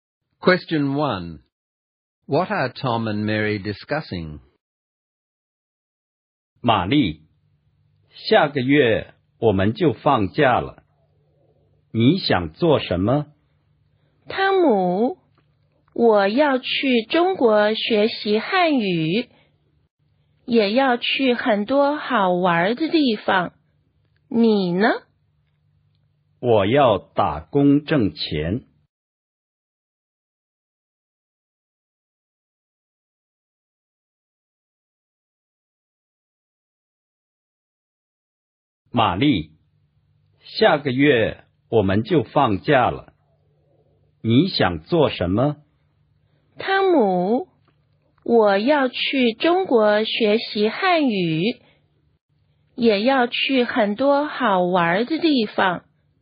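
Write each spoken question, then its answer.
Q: What are Tom and Mary discussing?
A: What they plan to do in next month's holidays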